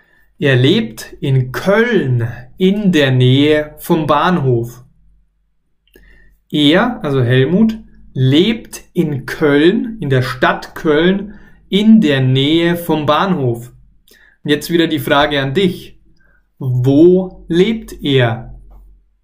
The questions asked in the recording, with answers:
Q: Wo lebt er?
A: In Köln. Er lebt in der Stadt Köln.